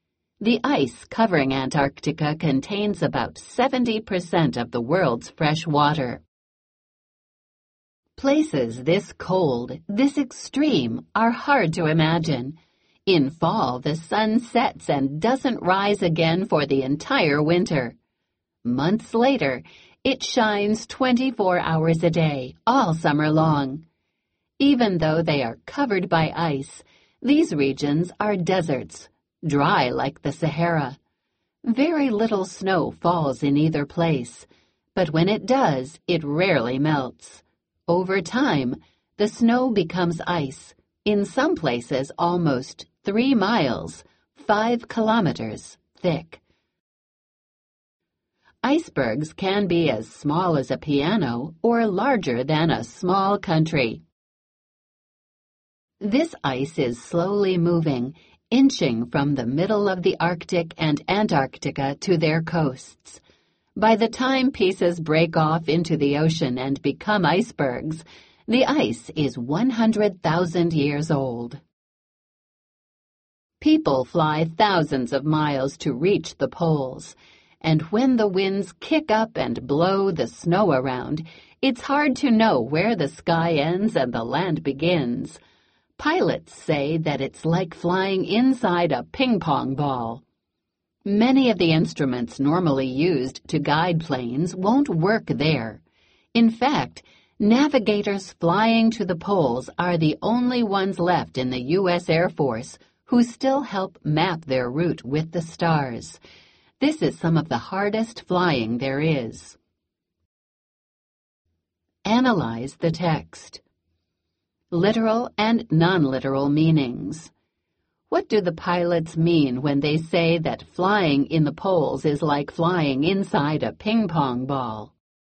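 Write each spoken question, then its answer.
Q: What do the pilots mean when they say that flying in the poles is like flying inside a ping-pong ball?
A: Everything is white from blowing snow, so it's hard to tell where the sky ends and the land begins.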